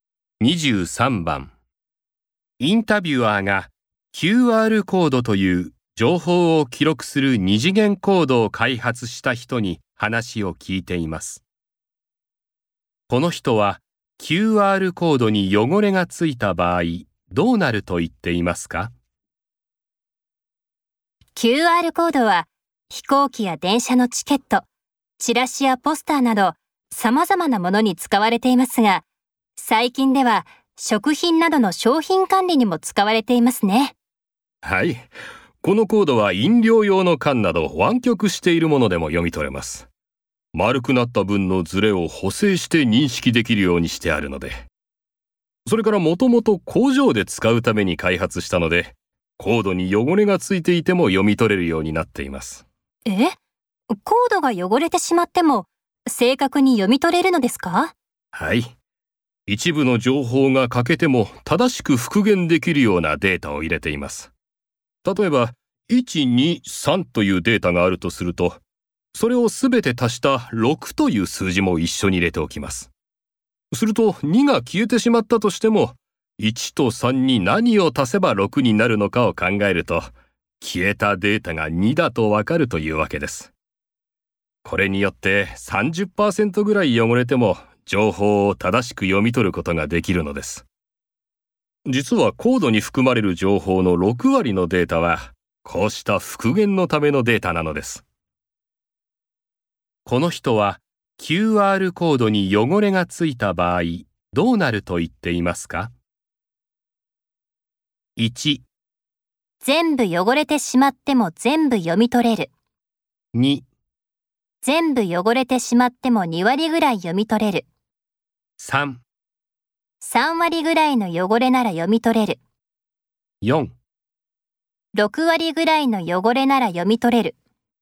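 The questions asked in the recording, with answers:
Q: この人は QR コードに汚れがついた場合どうなると言っていますか?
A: 3: 3割ぐらいの汚れなら読み取れる。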